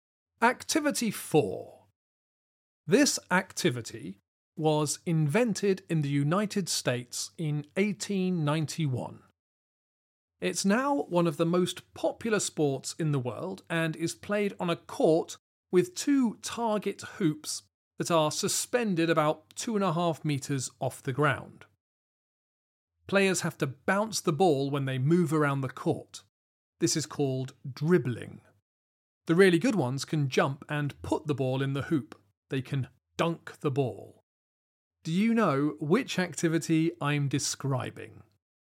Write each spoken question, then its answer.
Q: Do you know which activity I'm describing?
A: The answer is basketball.